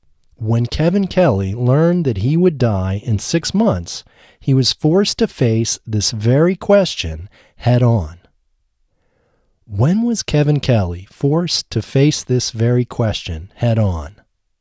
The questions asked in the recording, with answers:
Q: When was Kevin Kelly forced to face this very question head on?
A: When Kevin Kelly learned that he would die in 6 months, he was forced to face this very question head on.